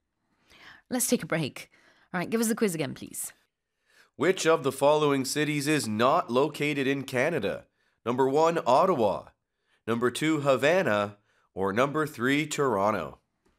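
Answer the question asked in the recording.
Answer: 2: Havana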